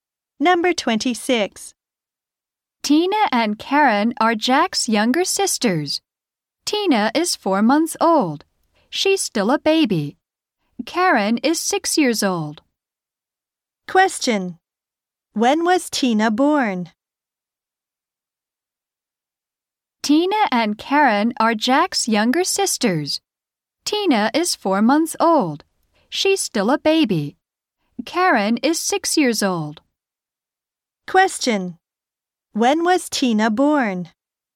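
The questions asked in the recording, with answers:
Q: When was Tina born?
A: Four months ago.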